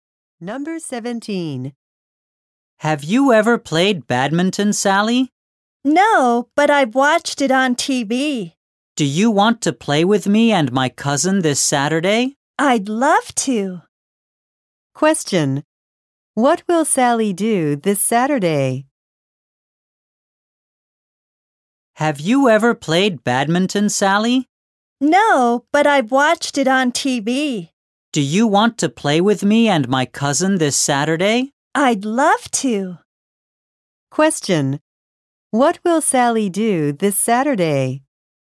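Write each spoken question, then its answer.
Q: What will Sally do this Saturday?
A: Play badminton.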